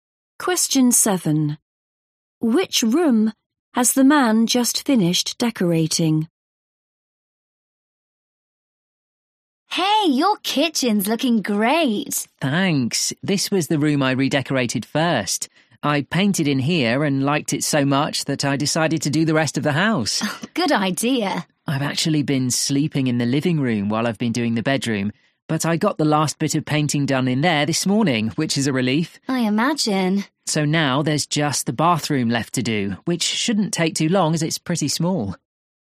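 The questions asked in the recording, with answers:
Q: Which room has the man just finished decorating?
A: The bedroom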